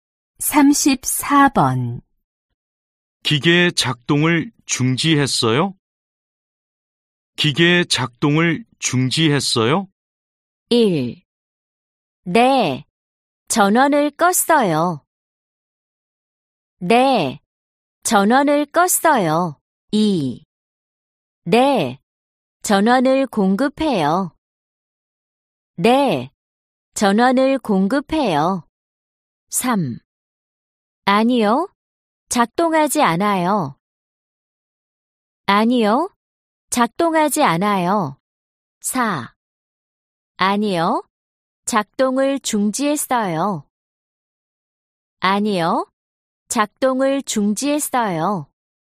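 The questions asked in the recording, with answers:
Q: 기계 작동을 중지했어요?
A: 1: 네. 전원을 껐어요.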